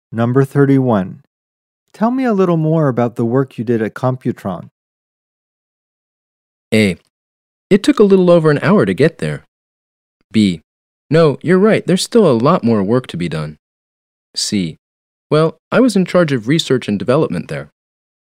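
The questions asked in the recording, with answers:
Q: Tell me a little more about the work you did at Computron.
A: C: Well, I was in charge of research and development there.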